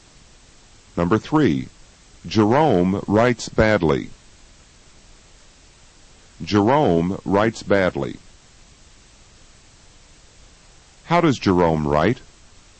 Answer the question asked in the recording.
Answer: He writes badly.